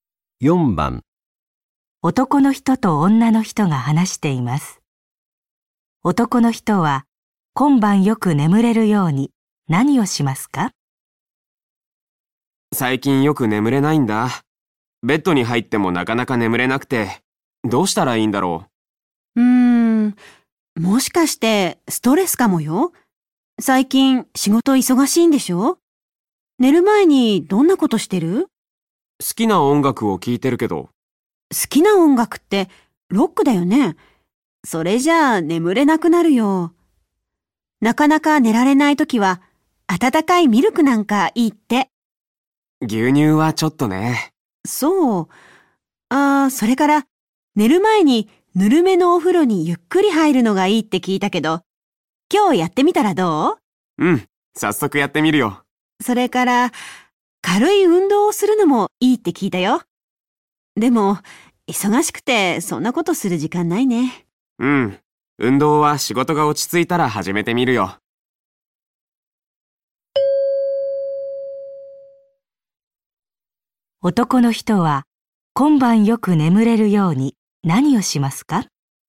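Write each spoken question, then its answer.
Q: 男の人は今晩よく眠れるように何をしますか?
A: 寝る前にぬるめのお風呂にゆっくり入る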